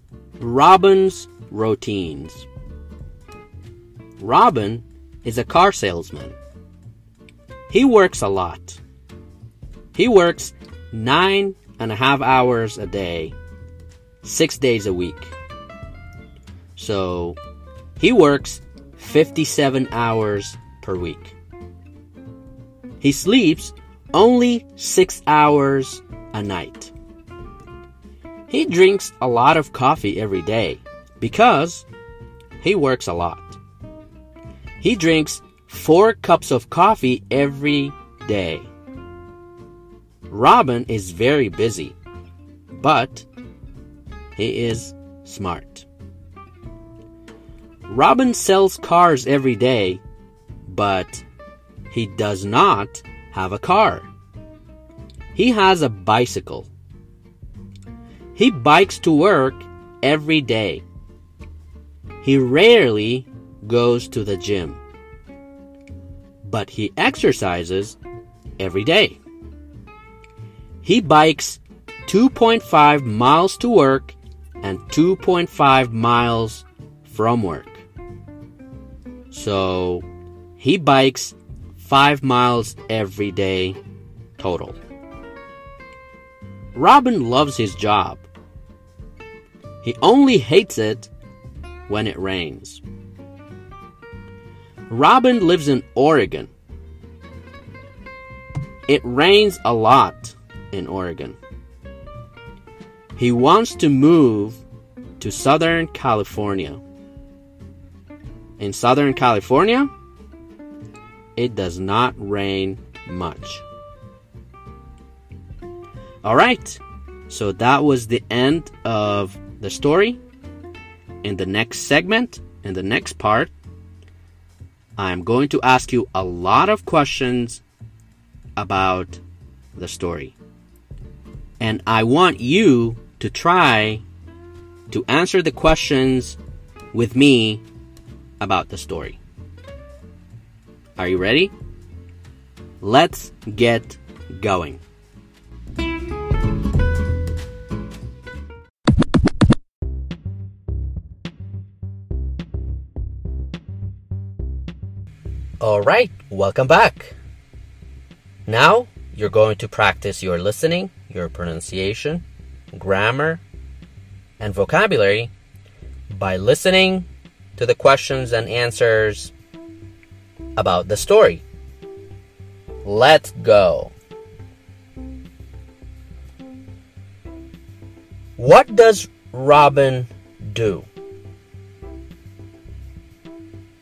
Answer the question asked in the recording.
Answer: He is a car salesman.